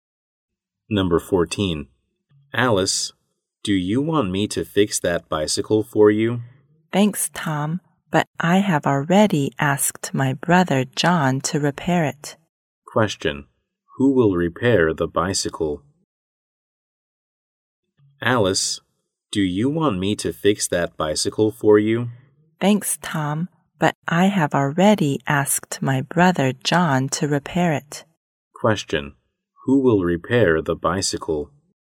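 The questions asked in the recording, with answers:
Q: Who will repair the bicycle?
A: John, Alice's brother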